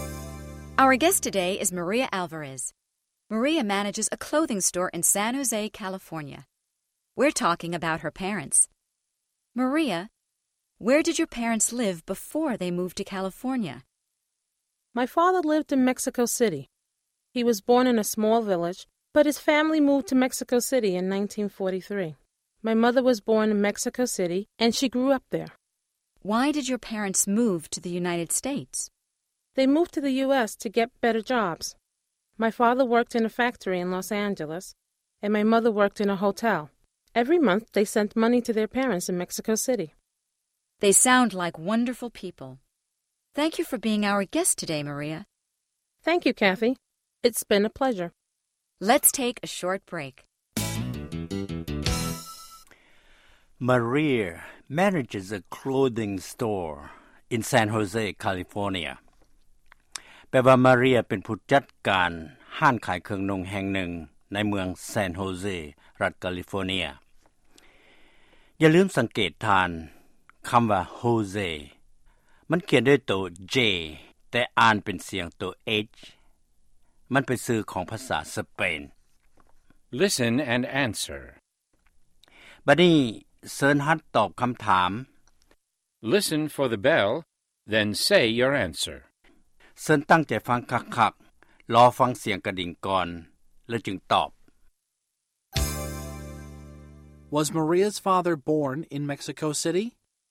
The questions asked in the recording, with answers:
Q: Was Maria's father born in Mexico City?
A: No, he wasn't. He was born in a small village.